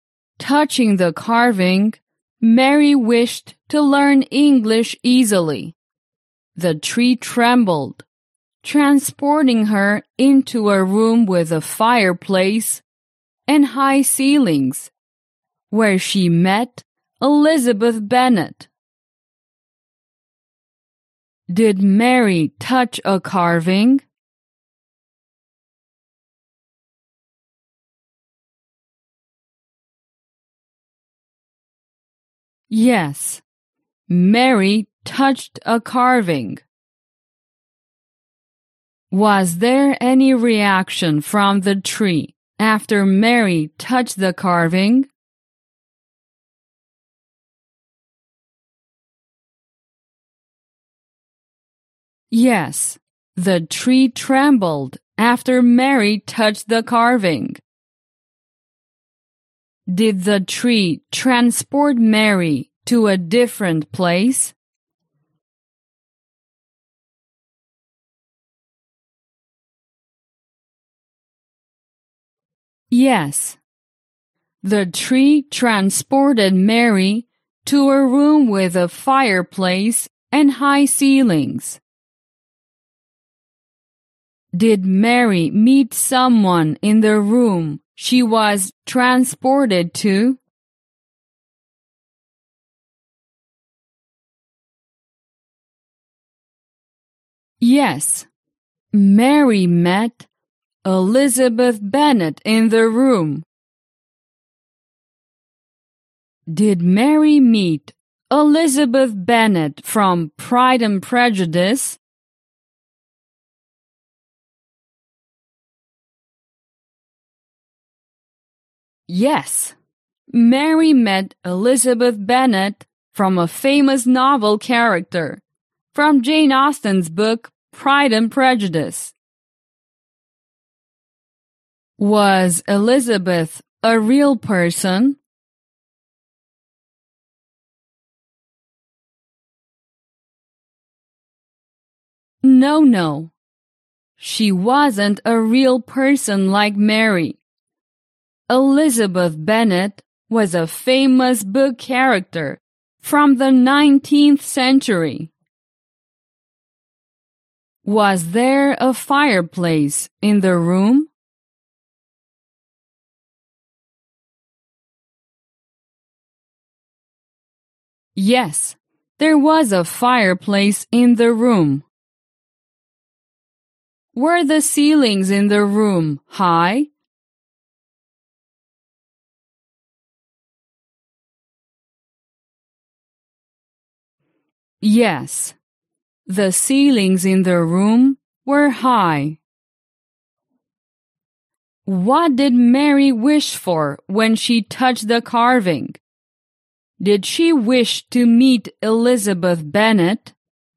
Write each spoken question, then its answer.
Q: What did Mary wish for when she touched the carving?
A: No, Mary didn't wish to meet Elizabeth Bennet when she touched the carving.